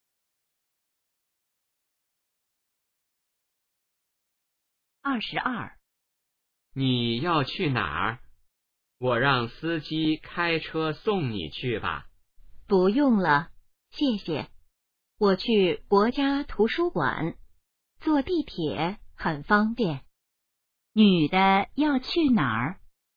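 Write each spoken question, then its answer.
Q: 女的要去哪儿?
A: 国家图书馆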